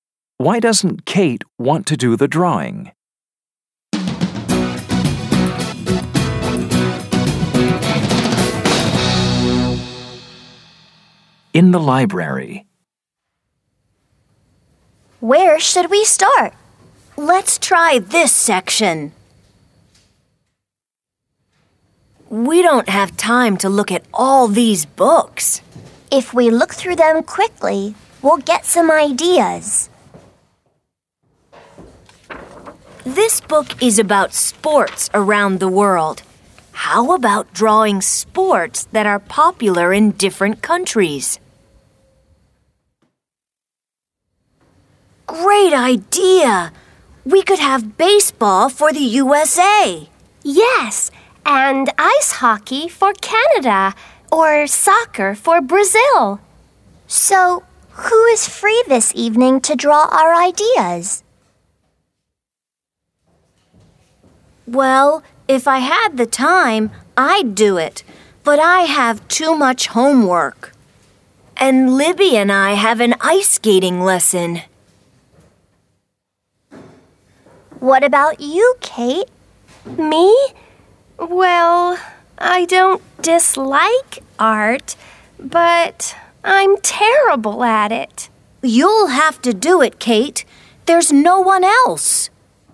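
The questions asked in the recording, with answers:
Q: Why doesn't Kate want to do the drawing?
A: Because she's terrible at art.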